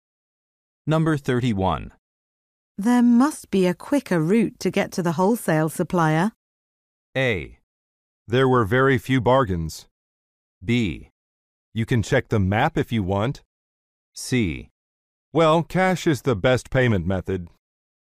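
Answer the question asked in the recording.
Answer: B: You can check the map if you want.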